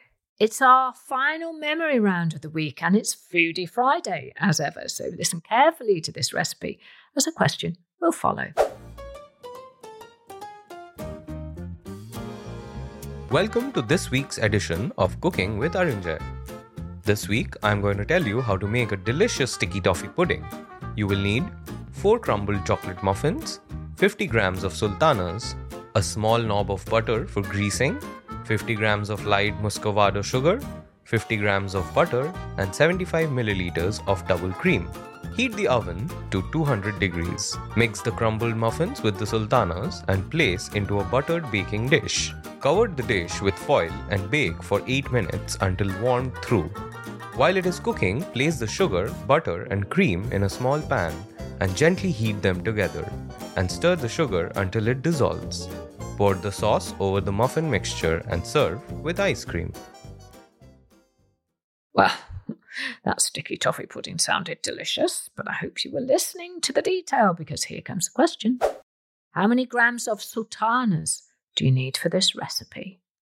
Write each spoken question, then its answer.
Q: How many grams of sultanas do you need for this recipe?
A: The answer I was looking for was 50 grams.